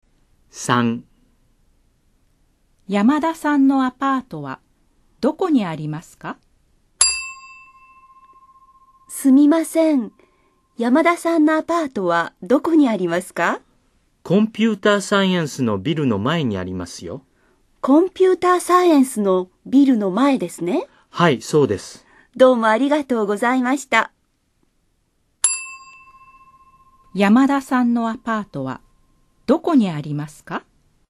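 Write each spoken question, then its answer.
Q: 山田さんのアパートはどこにありますか?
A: コンピューターサイエンスのビルの前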